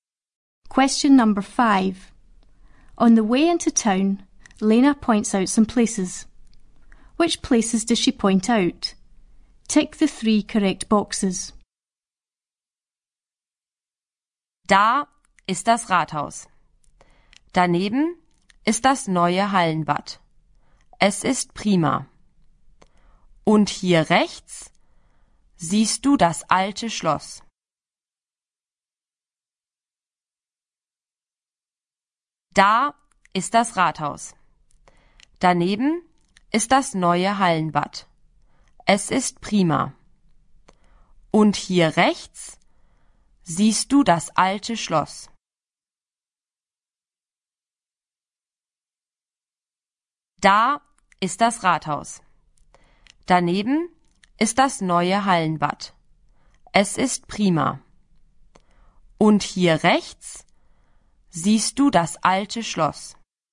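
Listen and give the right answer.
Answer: The town hall, the new indoor swimming pool and the old castle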